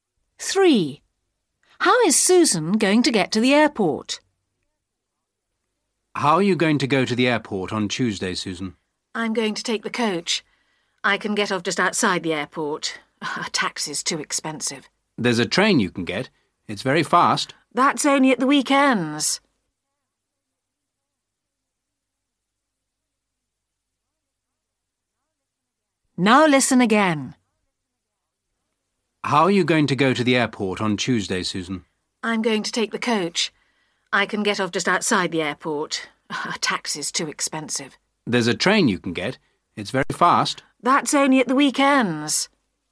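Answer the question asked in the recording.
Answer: By coach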